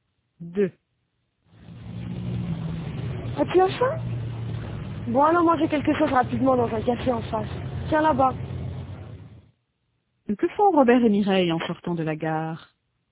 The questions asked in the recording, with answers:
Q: Que font Robert et Mireille en sortant de la gare?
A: Ils vont manger quelque chose.